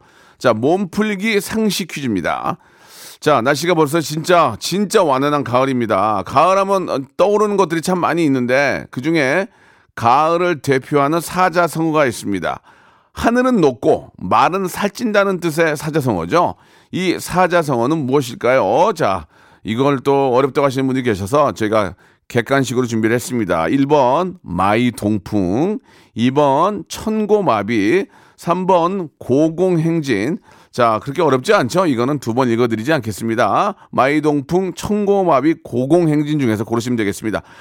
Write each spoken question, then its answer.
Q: 하늘은 높고 말은 살찐다는 뜻의 사자성어죠. 이 사자성어는 무엇일까요?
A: 가을을 대표하는 사자성어는 바로 청고마비였습니다.